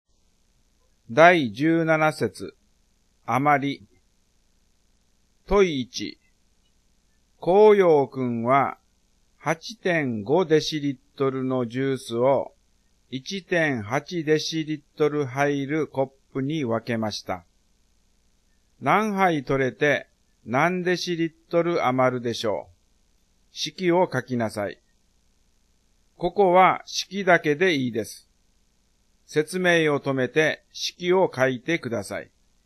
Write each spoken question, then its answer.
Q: 何杯取れて何デシリットル余るでしょう。式を書きなさい。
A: 8.5 割る 1.8 になりますね